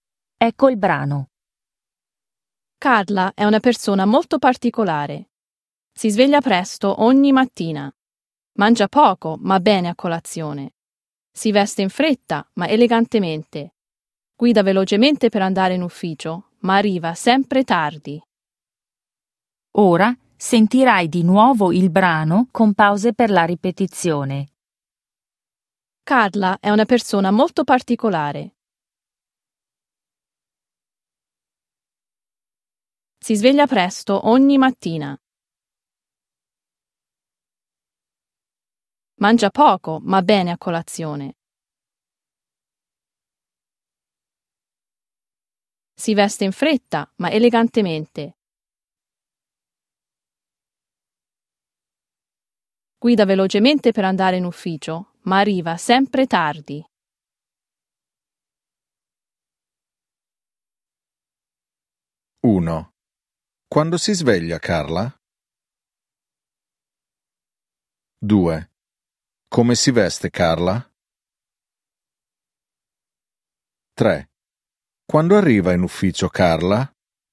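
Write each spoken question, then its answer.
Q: Quando si sveglia, Carla?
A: Presto ogni mattina

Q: Come si veste, Carla?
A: In fretta, ma elegantemente

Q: Quando arriva in ufficio, Carla?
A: Sempre tardi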